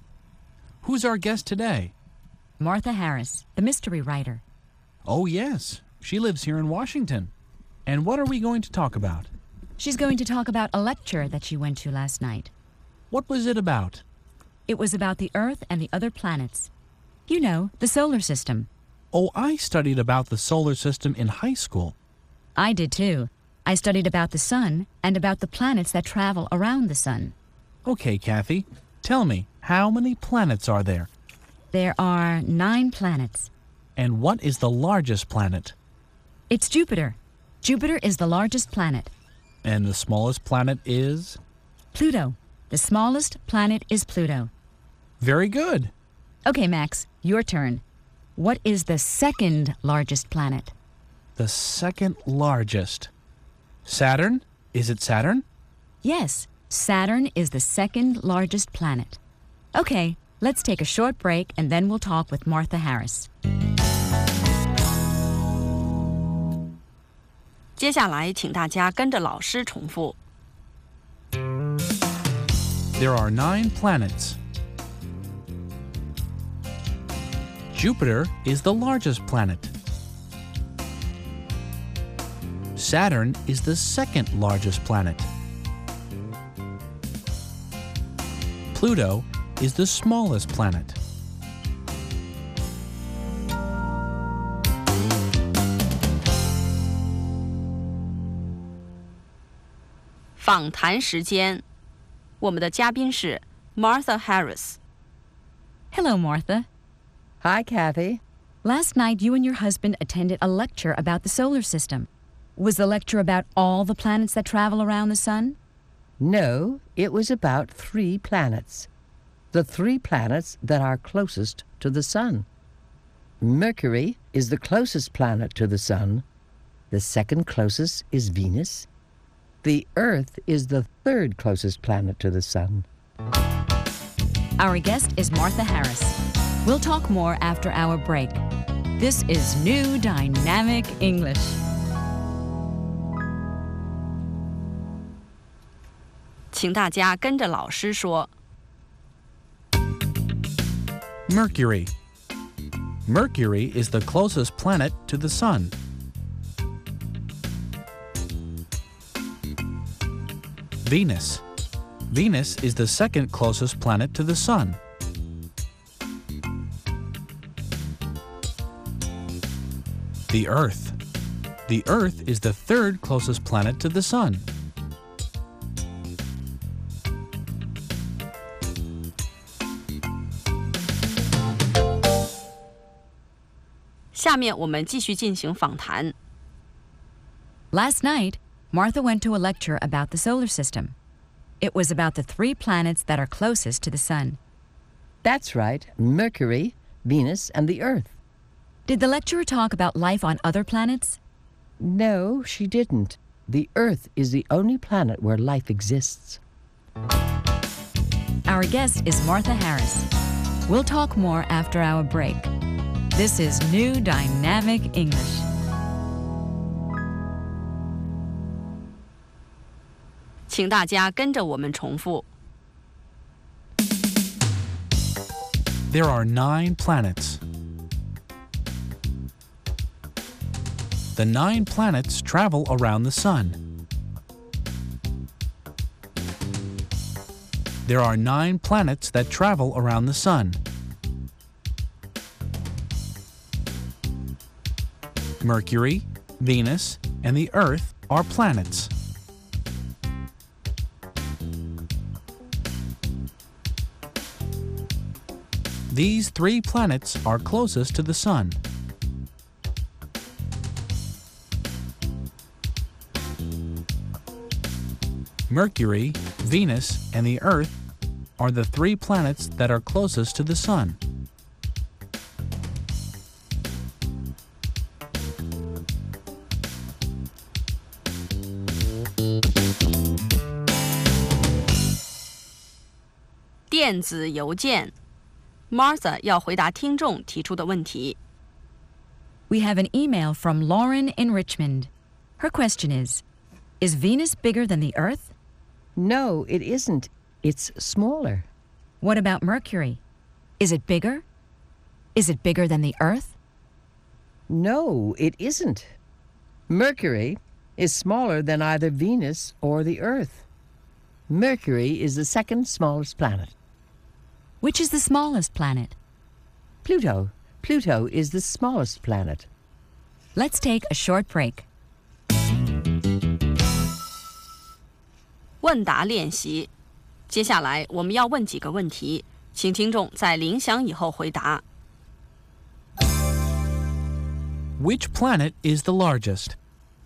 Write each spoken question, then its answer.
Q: Which planet is the largest?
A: Jupiter is the largest planet.